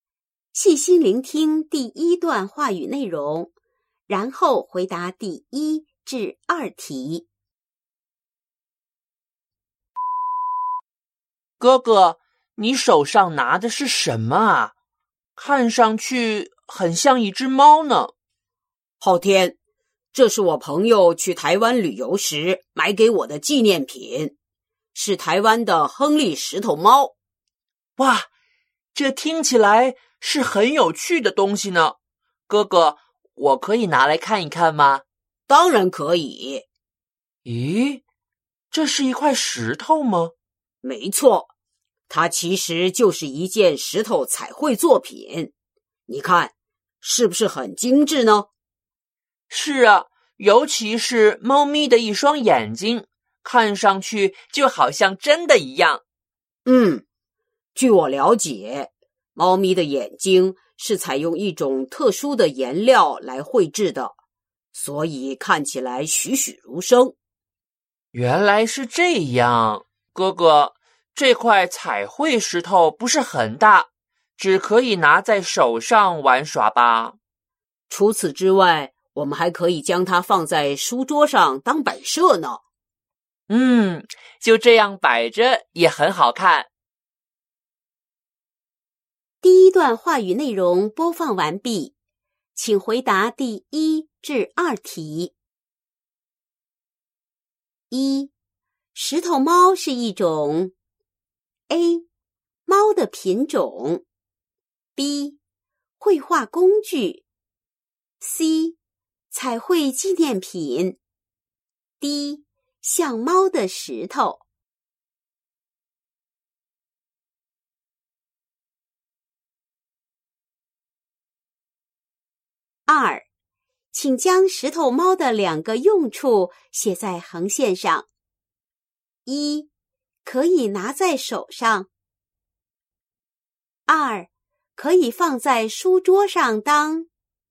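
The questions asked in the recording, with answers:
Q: 石头猫是一种 A. 猫的品种 B. 绘画工具 C. 彩绘纪念品 D. 像猫的石头。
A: C: 彩绘纪念品

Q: 请将石头猫的两个用处写在横线上。一,可以拿在手上。 二,可以放在书桌上当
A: 玩耍;摆设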